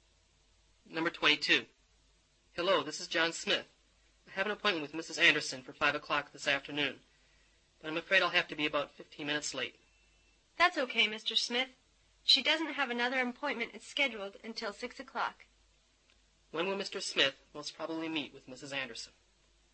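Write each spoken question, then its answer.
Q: When will Mr. Smith most probably meet with Mrs.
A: 5:15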